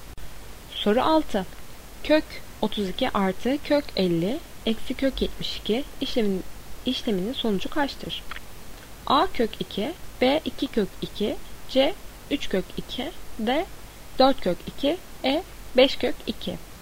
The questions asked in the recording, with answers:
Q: Kök 32 artı kök 50 eksi kök 72 işleminin sonucu kaçtır?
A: Doğru cevap C 3 kök 2.